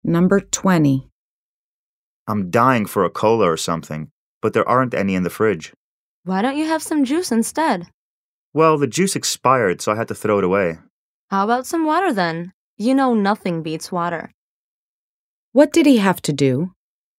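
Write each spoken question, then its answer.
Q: What did he have to do?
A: Throw away the expired juice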